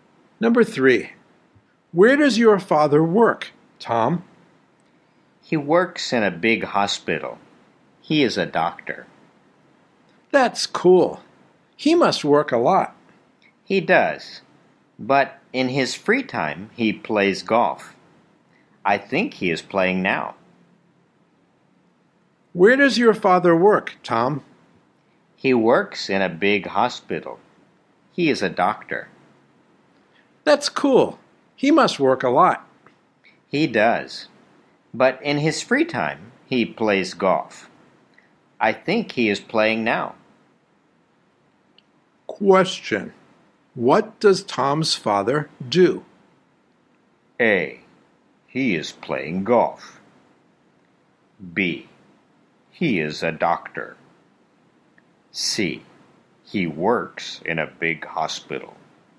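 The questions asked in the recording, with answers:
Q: What does Tom's father do?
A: B: He is a doctor.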